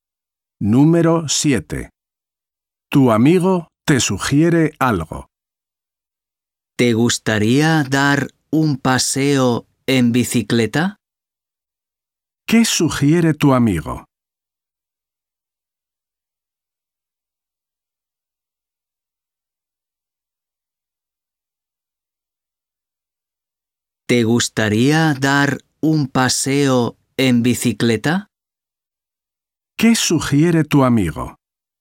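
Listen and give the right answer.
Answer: dar un paseo en bicicleta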